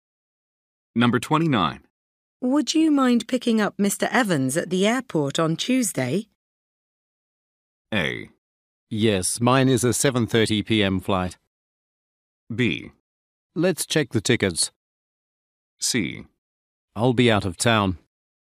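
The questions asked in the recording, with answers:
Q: Would you mind picking up Mr. Evans at the airport on Tuesday?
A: C: I'll be out of town.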